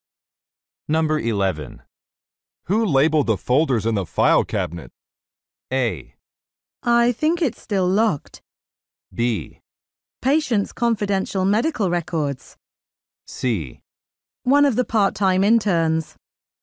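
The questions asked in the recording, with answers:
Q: Who labeled the folders in the file cabinet?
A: C: One of the part-time interns.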